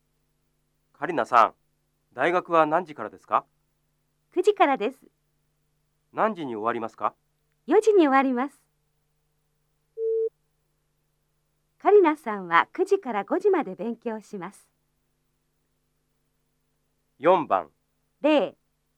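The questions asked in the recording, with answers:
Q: カリナさんは9時から5時まで勉強します。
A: ×(いいえ、9時から4時までです)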